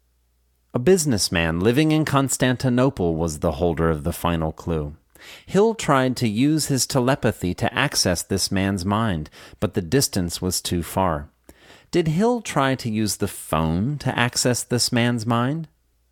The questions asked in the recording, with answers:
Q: Did Hill try to use the phone to access this man's mind?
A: No, Hill didn't try to use the phone to access this man's mind.